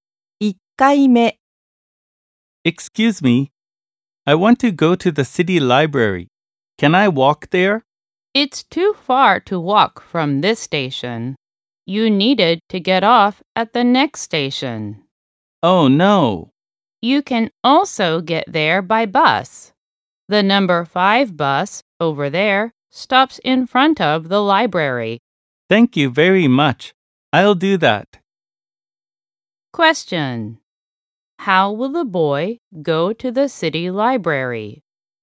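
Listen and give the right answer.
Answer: By bus (the number 5 bus)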